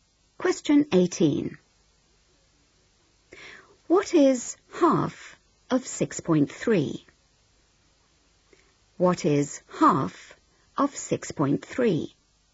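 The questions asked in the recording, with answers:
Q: What is half of 6.3?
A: 3.15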